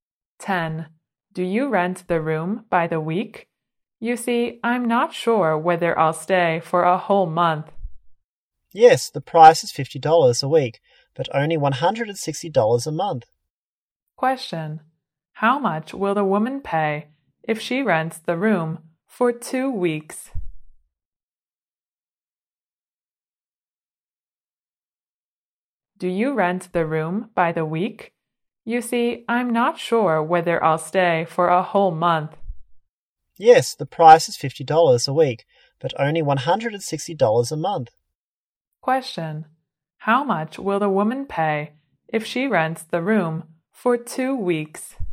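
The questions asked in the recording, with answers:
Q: How much will the woman pay if she rents the room for 2 weeks?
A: $100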